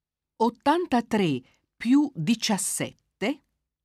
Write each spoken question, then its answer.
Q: 83 più 17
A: fa 100.